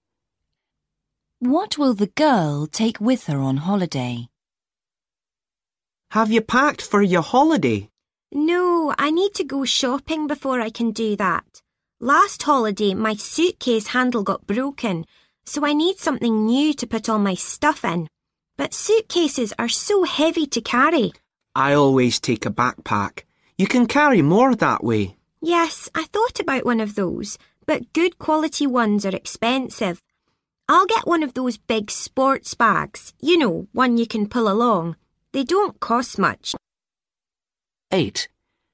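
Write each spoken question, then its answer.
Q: What will the girl take with her on holiday?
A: A big sports bag you can pull along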